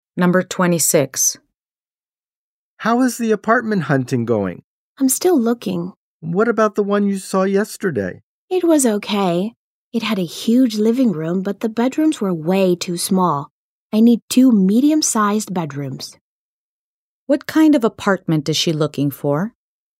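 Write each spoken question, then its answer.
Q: What kind of apartment is she looking for?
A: One with two medium-sized bedrooms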